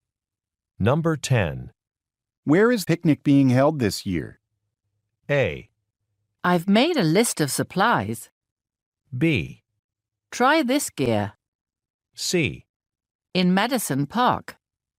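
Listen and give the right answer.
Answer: C: In Madison Park.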